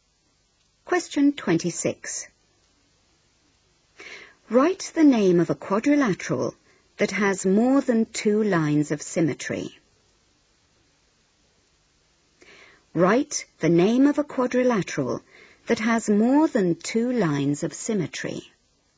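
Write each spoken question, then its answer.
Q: Write the name of a quadrilateral that has more than two lines of symmetry.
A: Square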